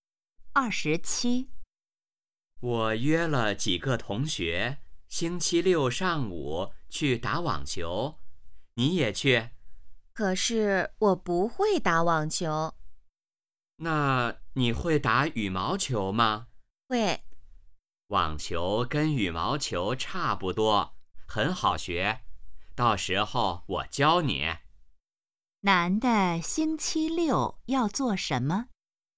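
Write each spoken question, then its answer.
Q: 男的星期六要做什么?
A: 去打网球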